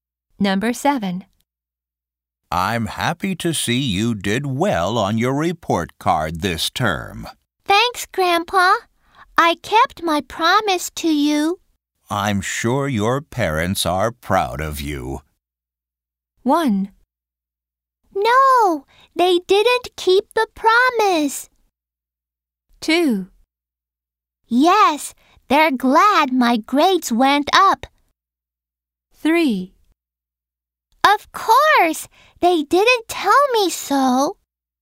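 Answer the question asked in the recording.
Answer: 2: Yes, they're glad my grades went up.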